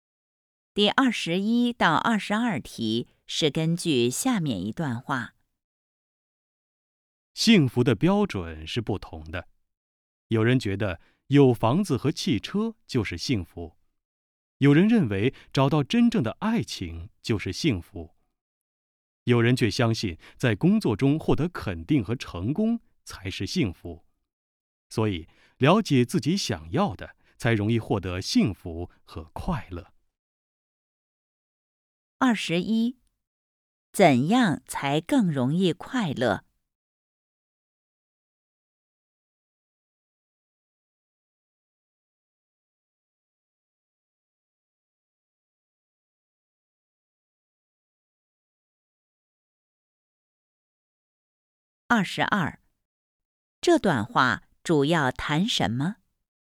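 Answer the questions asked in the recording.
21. 了解自己想要的
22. 幸福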